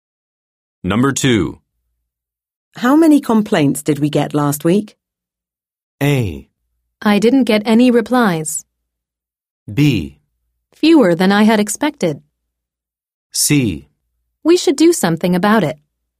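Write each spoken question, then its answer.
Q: How many complaints did we get last week?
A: B: Fewer than I had expected.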